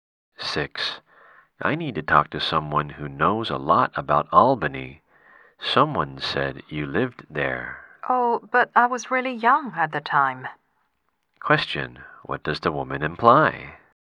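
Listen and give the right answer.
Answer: She doesn't know much about Albany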